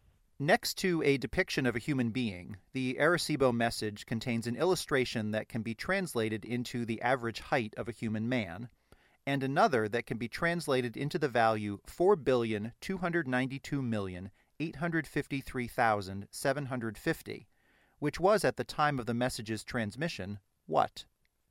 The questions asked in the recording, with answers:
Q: 4,292,853,750, which was at the time of the message's transmission, what?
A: It was at the time the current the human population of Earth.